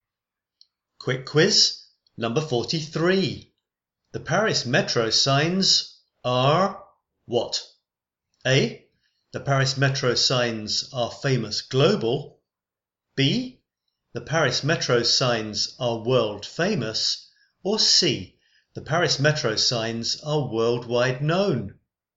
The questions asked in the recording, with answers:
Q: The Paris Metro signs are what?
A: And the answer is B. The Paris Metro signs are world famous.